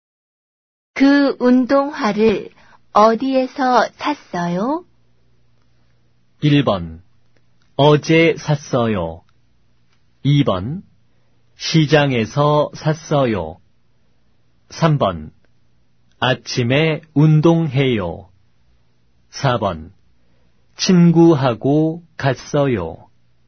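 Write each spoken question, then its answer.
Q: 그 운동화를 어디에서 샀어요?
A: 2: 시장에서 샀어요.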